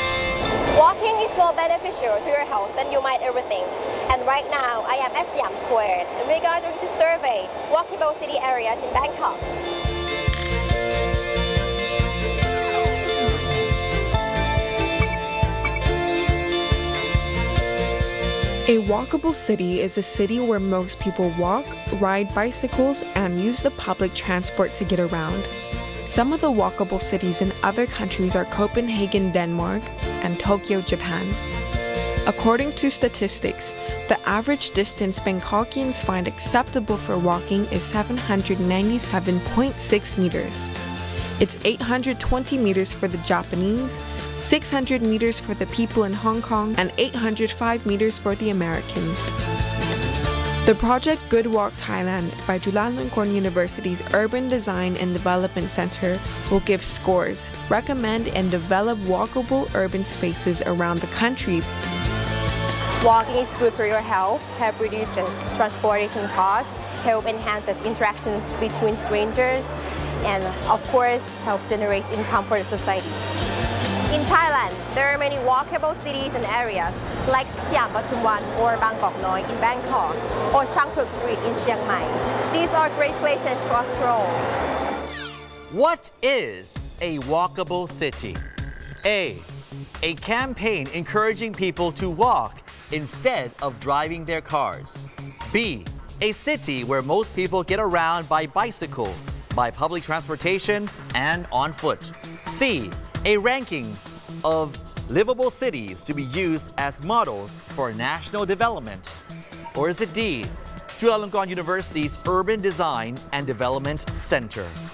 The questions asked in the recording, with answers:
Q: What is a walkable city?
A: The answer is B, a city where most people get around by bicycle, by public transportation, and on foot.